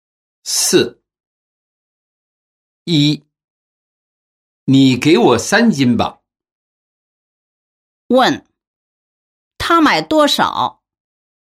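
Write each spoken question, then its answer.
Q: 问他买多少?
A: 三斤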